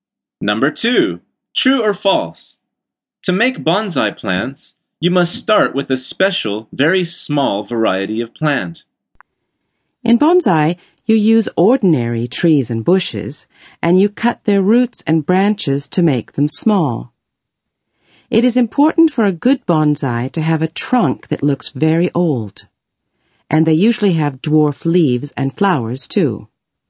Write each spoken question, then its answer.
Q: To make bonsai plants, you must start with a special, very small variety of plant.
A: The answer is false.